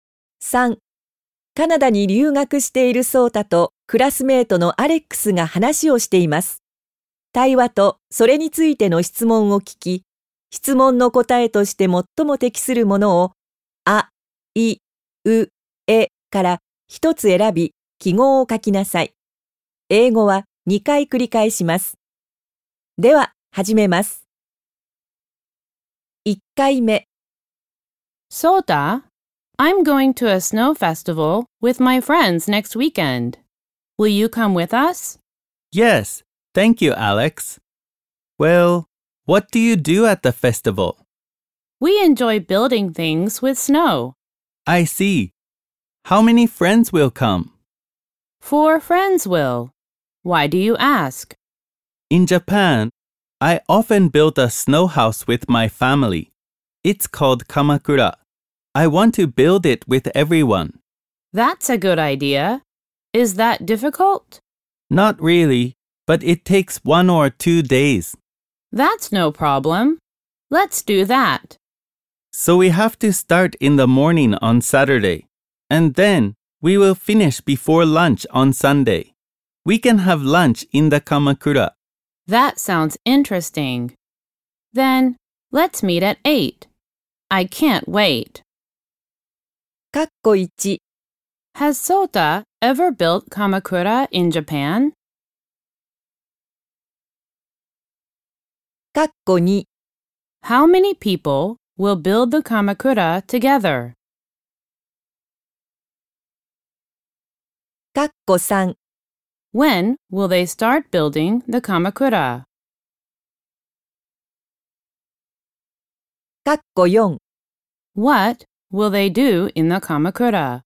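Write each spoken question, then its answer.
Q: Has Sota ever built Kamakura in Japan?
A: Yes, he has.

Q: When will they start building the Kamakura?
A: On Saturday morning (at 8)

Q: What?Will they do in the Kamakura?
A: They will have lunch.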